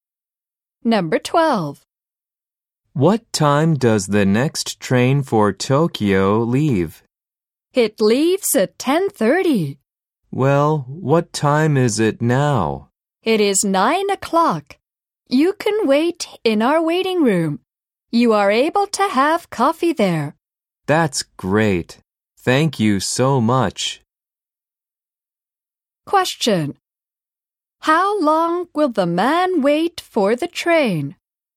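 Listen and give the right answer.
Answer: An hour and a half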